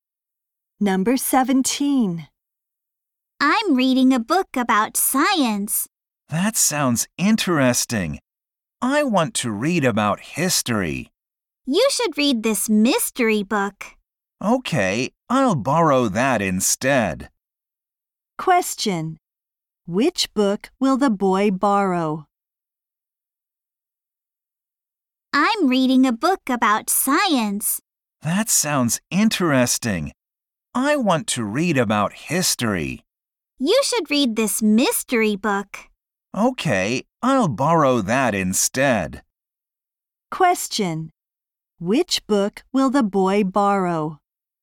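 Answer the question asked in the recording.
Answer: The mystery book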